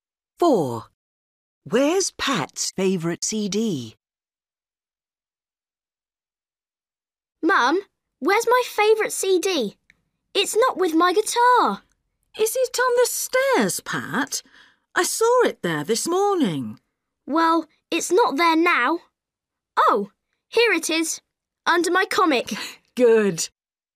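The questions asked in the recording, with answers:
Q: Where's Pat's favorite CD?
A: Under his comic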